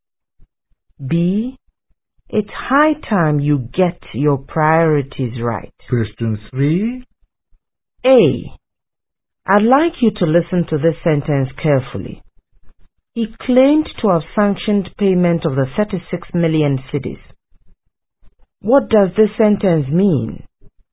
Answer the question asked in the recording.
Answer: The sentence means he claimed to have authorized payment of the 36 million cedis.